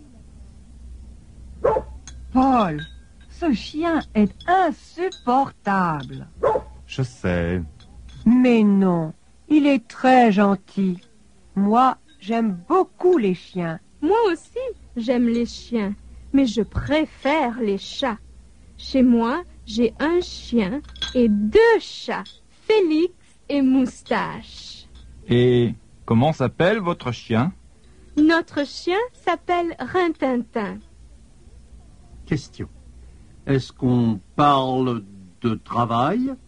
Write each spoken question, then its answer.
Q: Question. Est-ce qu'on parle de travail?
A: Non, on ne parle pas de travail.